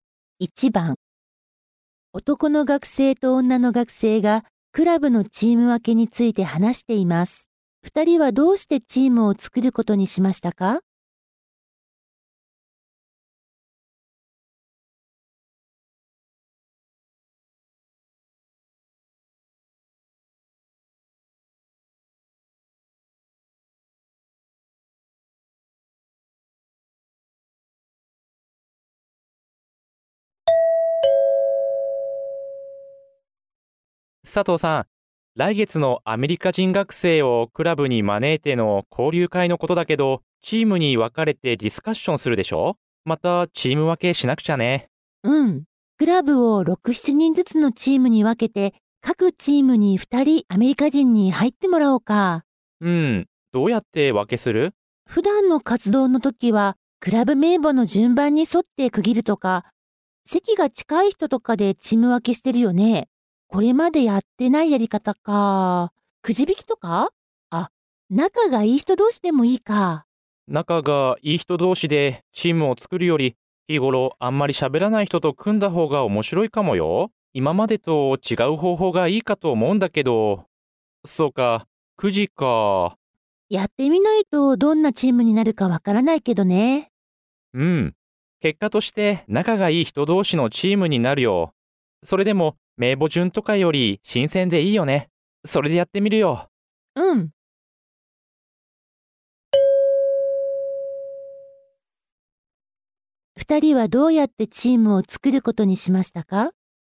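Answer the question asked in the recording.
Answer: くじ引きで作る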